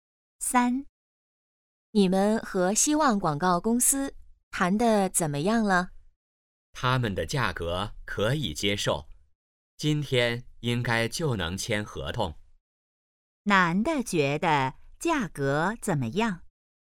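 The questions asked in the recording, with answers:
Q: 男的觉得价格怎么样?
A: 可以接受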